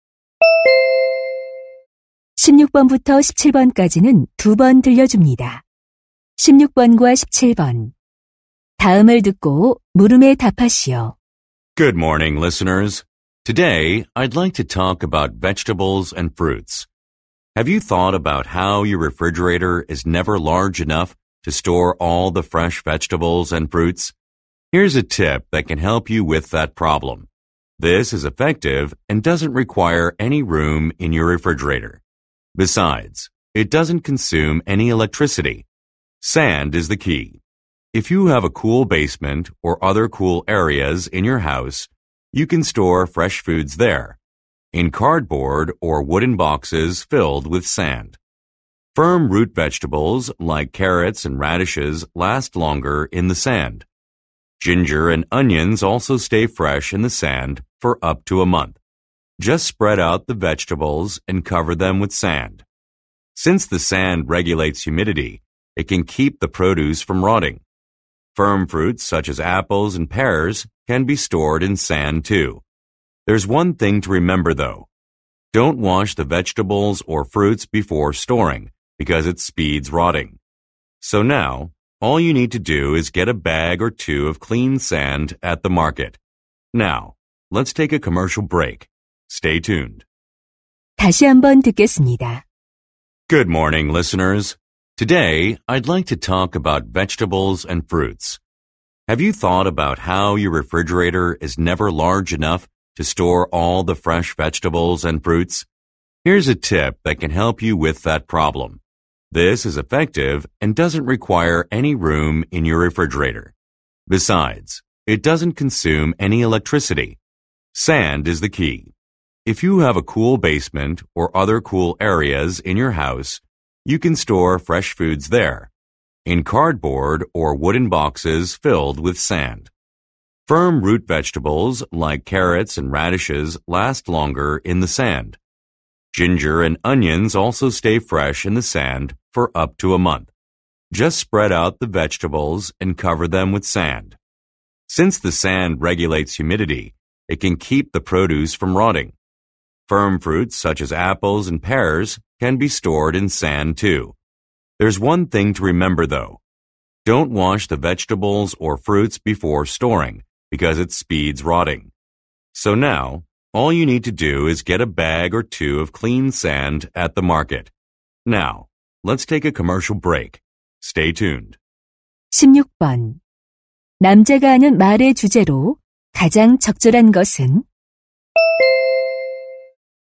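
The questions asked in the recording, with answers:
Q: 남자가 하는 말의 주제로 가장 적절한 것은?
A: 모래를 이용해 채소와 과일을 신선하게 보관하는 방법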